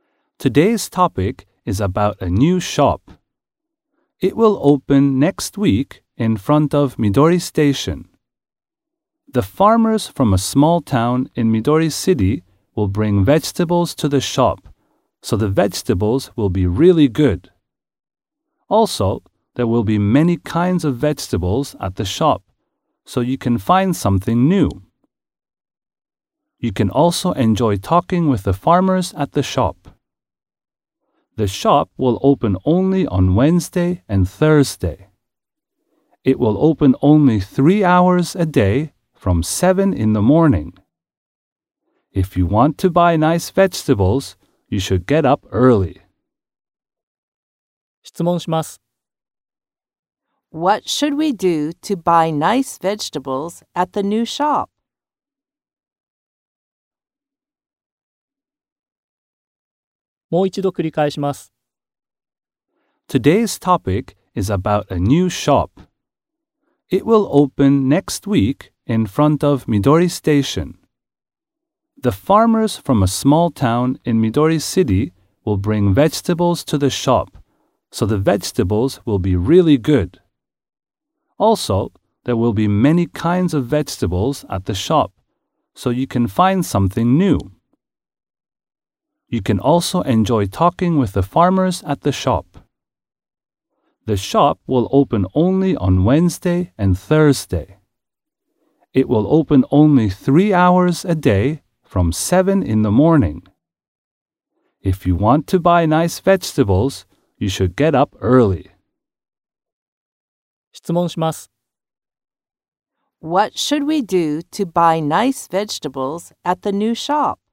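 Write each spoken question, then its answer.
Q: What should we do to buy nice vegetables at the new shop?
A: We should get up early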